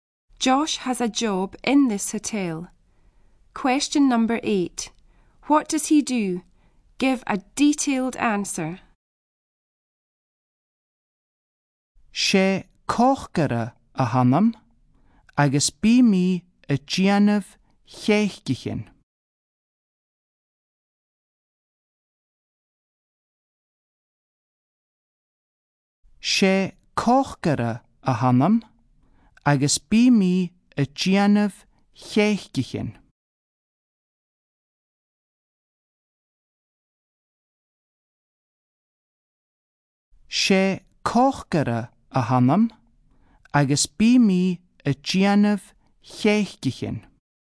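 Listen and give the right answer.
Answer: He is a cook and makes cakes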